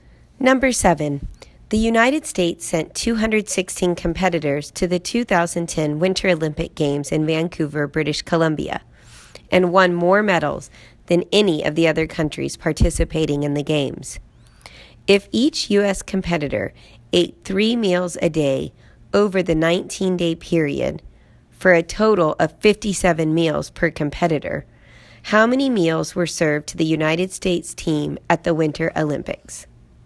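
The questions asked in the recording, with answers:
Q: If each U.S. competitor ate 3 meals a day over the 19-day period for a total of 57 meals per competitor, how many meals were served to the United States team at the Winter Olympics?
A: 12,312 meals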